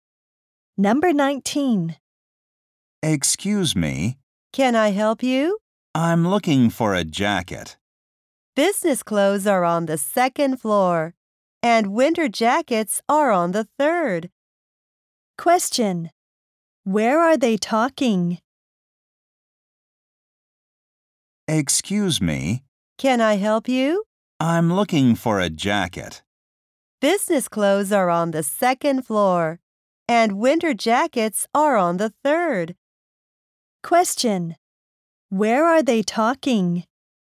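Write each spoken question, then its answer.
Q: Where are they talking?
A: In a clothing store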